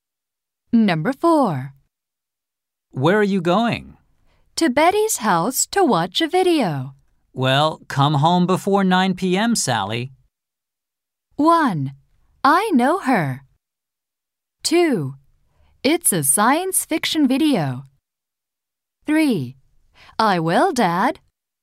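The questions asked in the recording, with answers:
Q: Well, come home before 9 p.m., Sally.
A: 3: I will, Dad.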